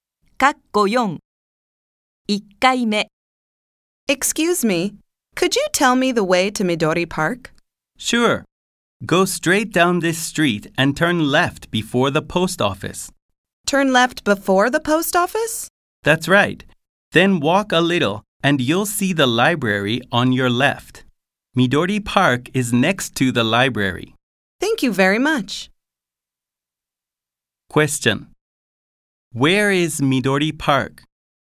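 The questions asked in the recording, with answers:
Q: Where is Midori Park?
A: Next to the library.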